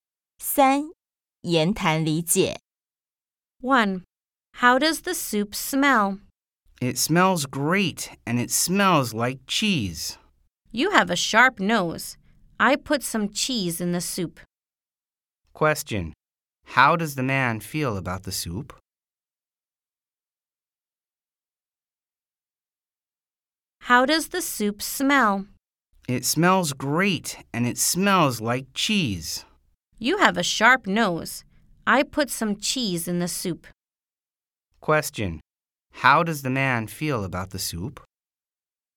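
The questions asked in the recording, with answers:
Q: Question, how does the man feel about the soup?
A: It smells great, like cheese.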